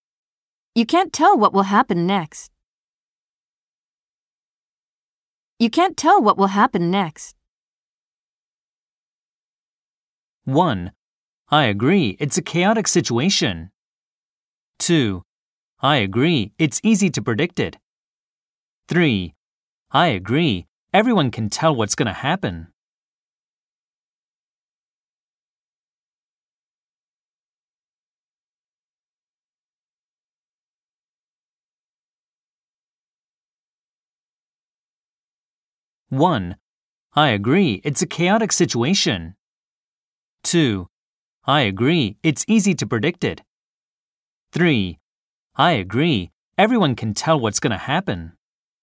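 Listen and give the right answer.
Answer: 1: I agree, it's a chaotic situation.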